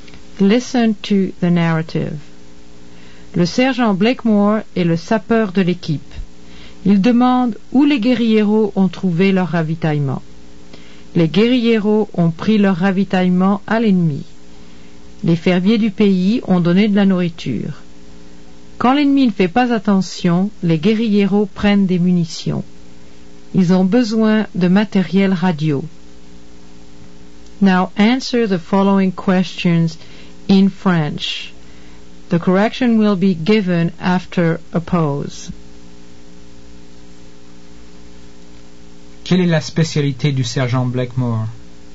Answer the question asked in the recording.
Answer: Il est sapeur.